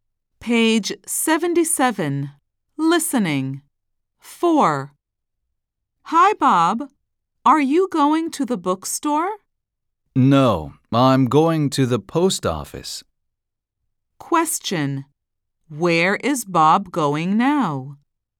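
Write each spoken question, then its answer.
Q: Where is Bob going now?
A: To the post office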